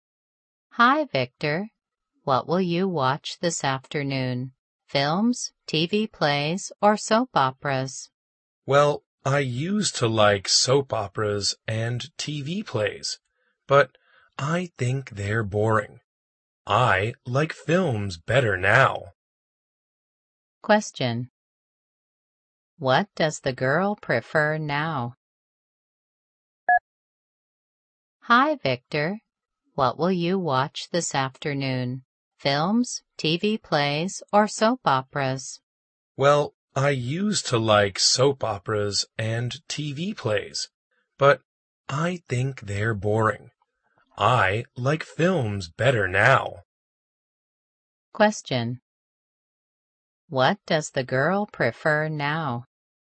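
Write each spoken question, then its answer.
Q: What does the girl prefer now?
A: Films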